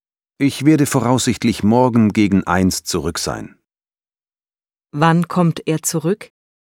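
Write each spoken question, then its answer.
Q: Wann kommt er zurück?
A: Voraussichtlich morgen gegen 1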